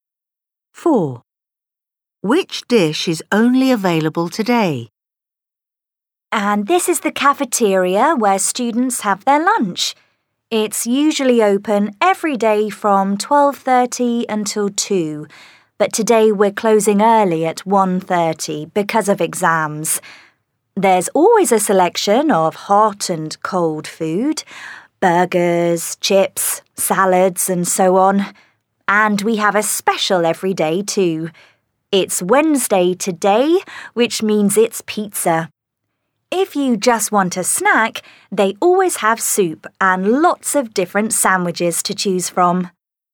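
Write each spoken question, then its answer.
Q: Which dish is only available today?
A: pizza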